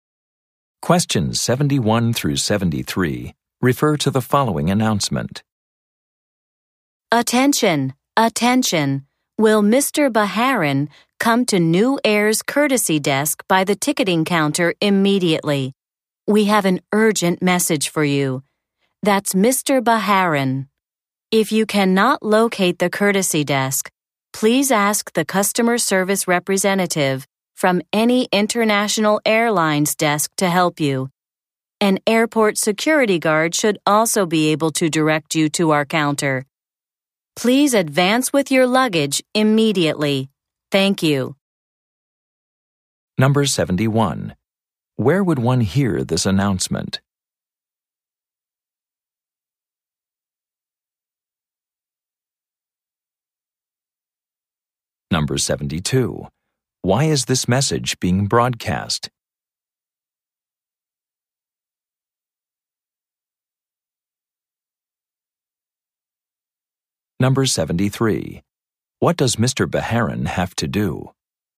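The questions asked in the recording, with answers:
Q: Where would one hear this announcement?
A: At an airport

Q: Why is this message being broadcast?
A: There is an urgent message for Mr. Baharin

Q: What does Mr. Baharin have to do?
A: Go to the courtesy desk with his luggage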